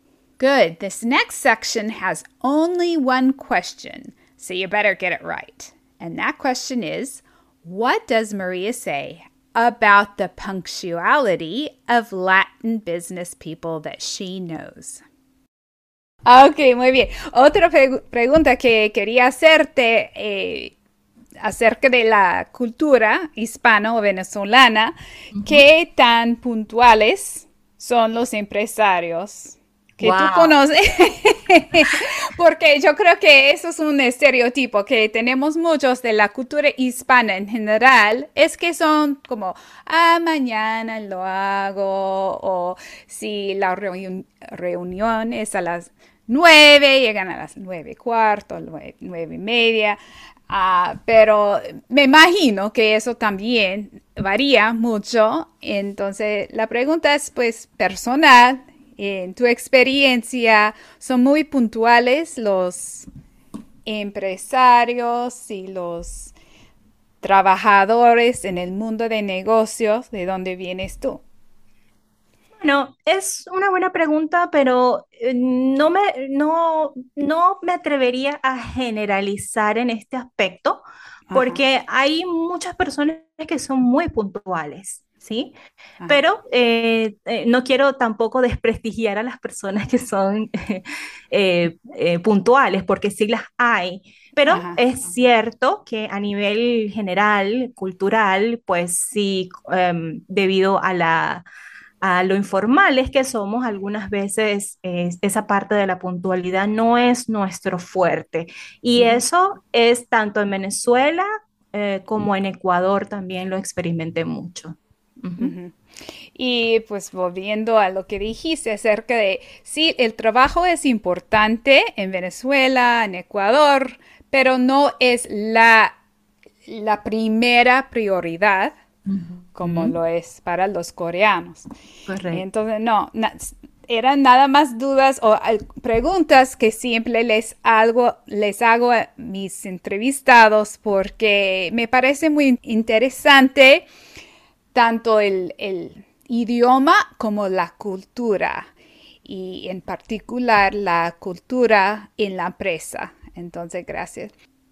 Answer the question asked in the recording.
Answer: Dice que hay personas muy puntuales y otras que no lo son.